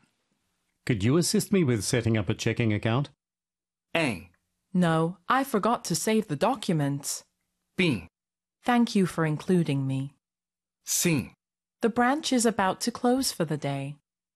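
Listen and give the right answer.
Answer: C: The branch is about to close for the day.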